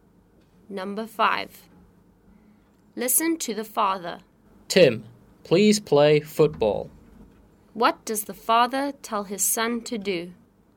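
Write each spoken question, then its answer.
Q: What does the father tell his son to do?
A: Play football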